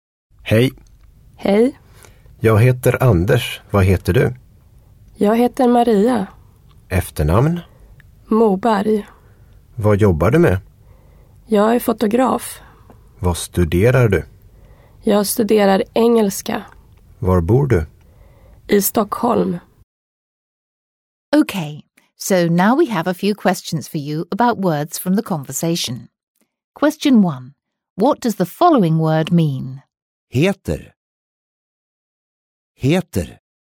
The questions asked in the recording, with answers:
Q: What does the following word mean? Heter. Heter.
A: If you said be named or be called, you're correct.